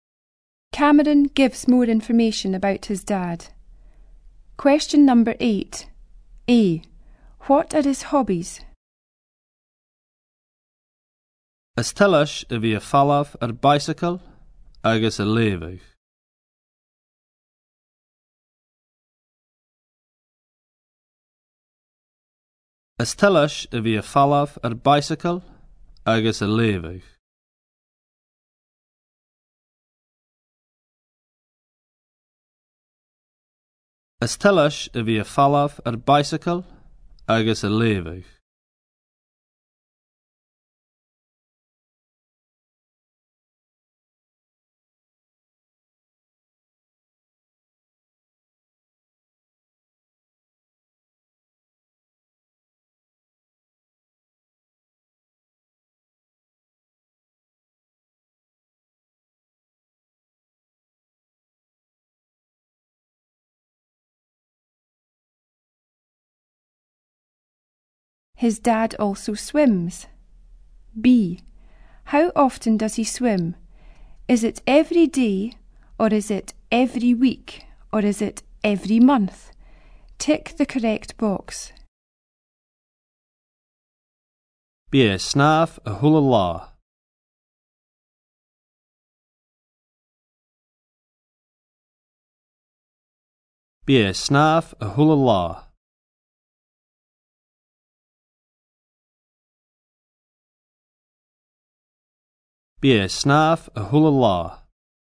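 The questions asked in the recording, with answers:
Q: How often does he swim?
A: Every day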